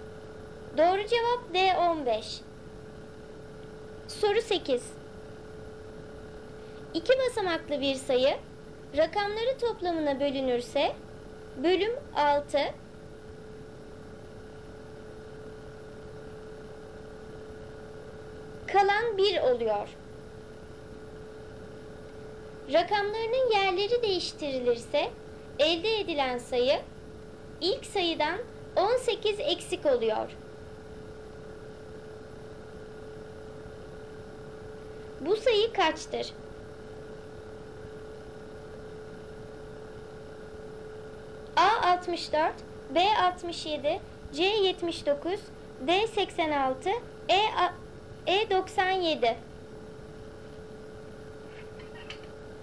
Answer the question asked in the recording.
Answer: Doğru cevap E 97.